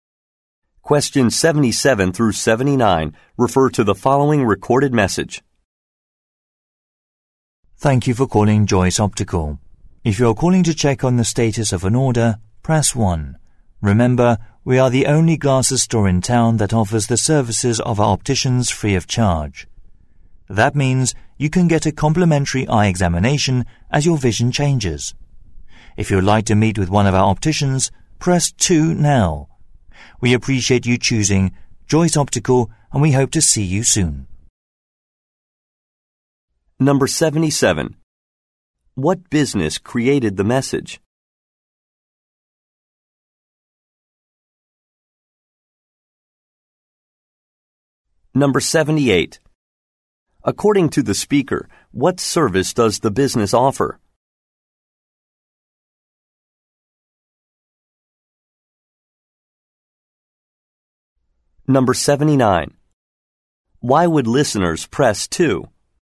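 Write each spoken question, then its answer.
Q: What business created the message?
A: A glasses store

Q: According to the speaker, what service does the business offer?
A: Free eye examinations by opticians

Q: Why would listeners press 2?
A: To meet with an optician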